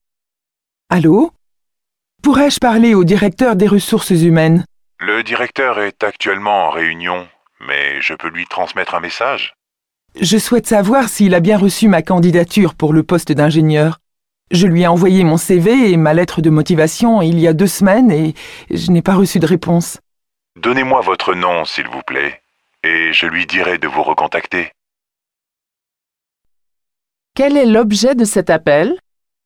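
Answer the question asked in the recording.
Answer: Savoir si le directeur a bien reçu sa candidature pour le poste d'ingénieur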